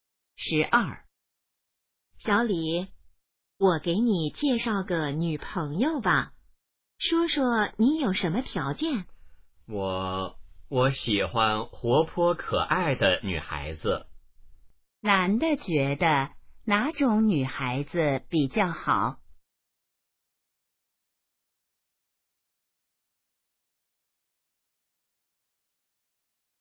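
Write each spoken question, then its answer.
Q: 男的觉得哪种女孩子比较好?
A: 活泼可爱的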